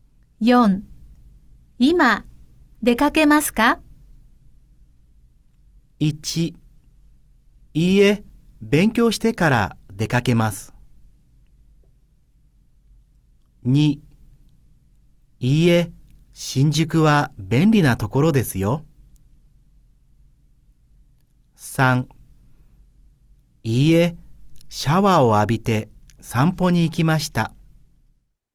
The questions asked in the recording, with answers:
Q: 今出かけますか?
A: 好,所以答案是一。好,答案是一。